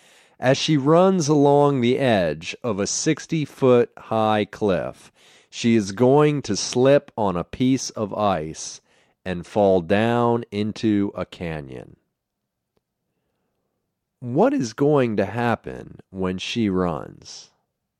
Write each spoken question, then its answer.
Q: What is going to happen when she runs?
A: She is going to slip on a piece of ice and fall.